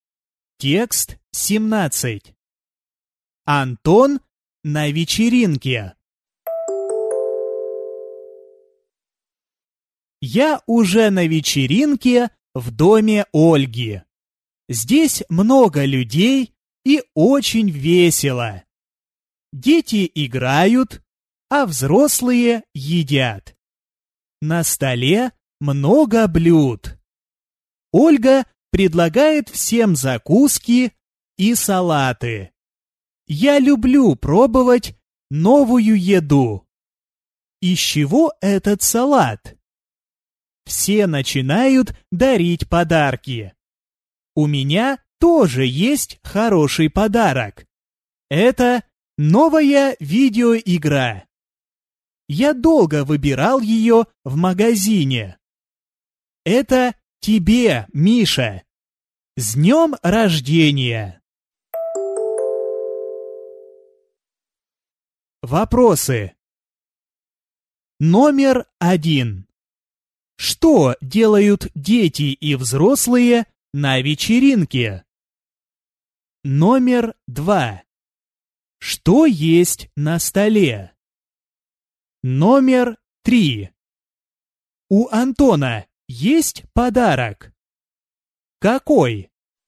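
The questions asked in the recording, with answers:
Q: Что делают дети и взрослые на вечеринке?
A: Дети играют, а взрослые едят.

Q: Что есть на столе?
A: Много блюд: закуски и салаты.

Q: У Антона есть подарок? Какой?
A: Да, новая видеоигра.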